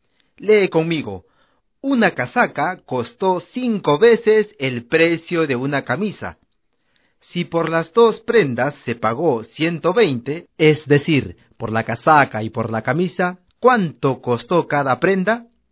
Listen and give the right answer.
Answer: La camisa costó 20 soles y la casaca costó 100 soles.